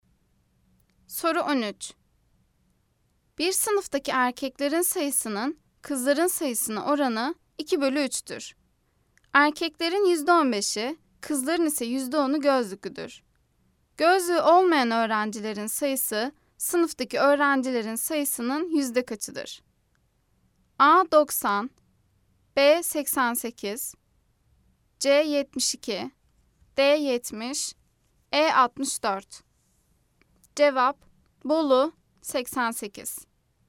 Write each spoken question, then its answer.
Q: Gözlüğü olmayan öğrencilerin sayısı sınıftaki öğrencilerin sayısının yüzde kaçıdır?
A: Cevap: Bolu 88.